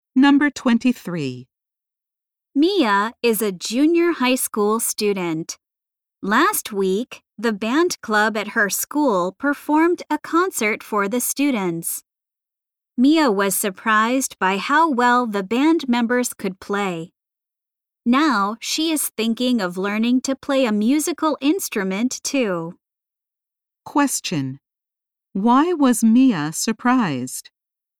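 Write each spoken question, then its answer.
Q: Why was Mia surprised?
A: The band members could play very well.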